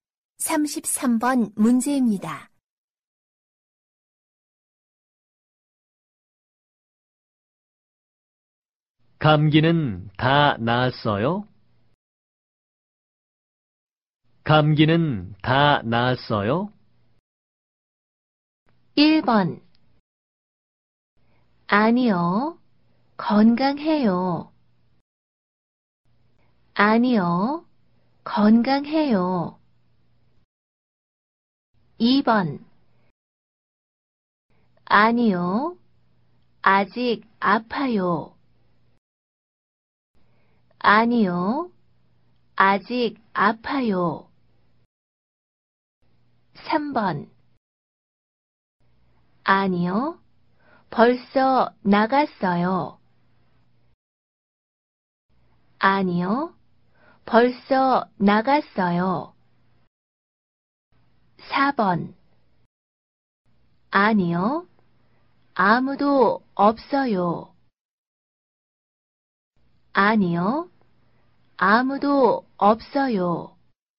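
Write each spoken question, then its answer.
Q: 감기는 다 나았어요?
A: 2: 아니요. 아직 아파요.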